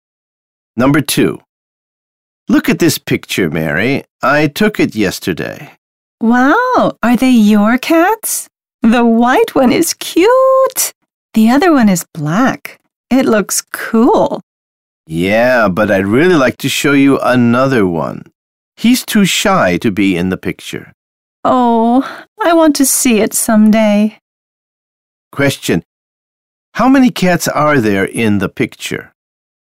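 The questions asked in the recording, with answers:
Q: How many cats are there in the picture?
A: Two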